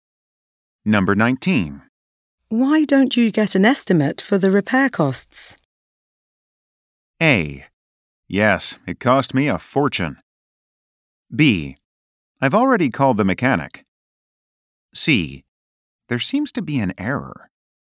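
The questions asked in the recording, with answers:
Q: Why don't you get an estimate for the repair costs?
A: B: I've already called the mechanic.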